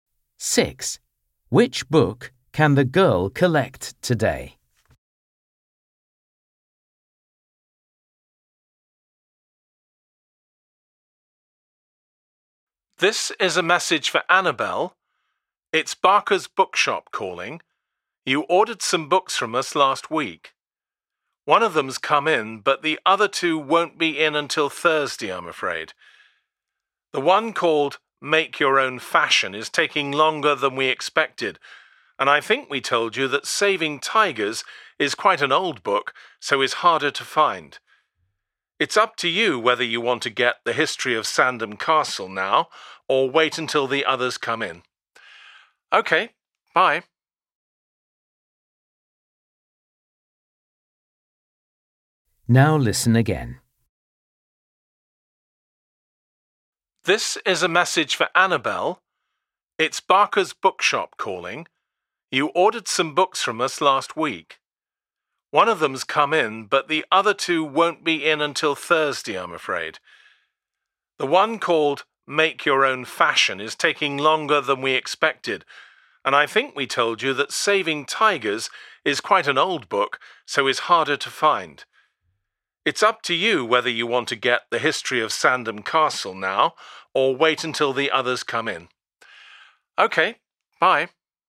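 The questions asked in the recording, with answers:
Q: Which book can the girl collect today?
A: The History of Sandham Castle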